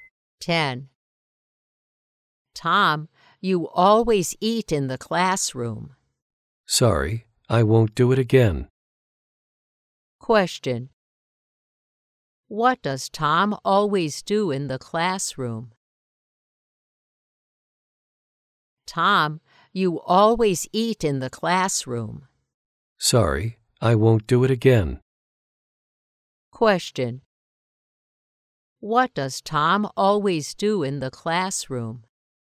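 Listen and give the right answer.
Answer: He eats in the classroom.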